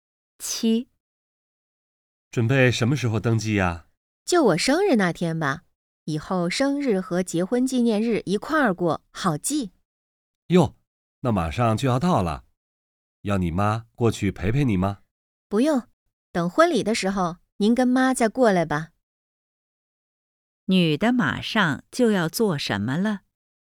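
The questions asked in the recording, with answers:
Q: 女的马上就要做什么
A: 登记结婚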